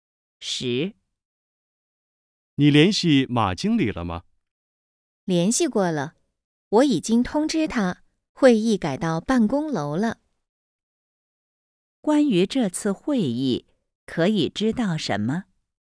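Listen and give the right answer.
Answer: 会议改到办公楼了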